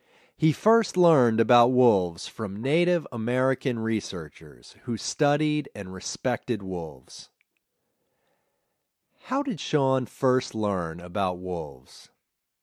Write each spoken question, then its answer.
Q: How did Sean first learn about wolves?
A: He first learned about wolves from Native American Indian researchers.